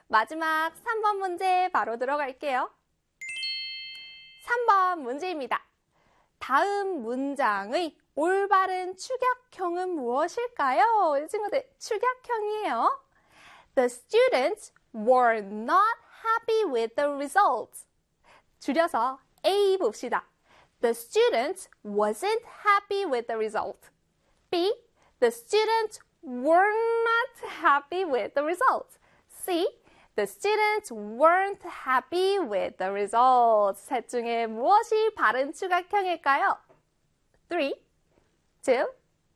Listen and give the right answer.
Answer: 바로 C의 the students weren't happy with the result가 되겠습니다.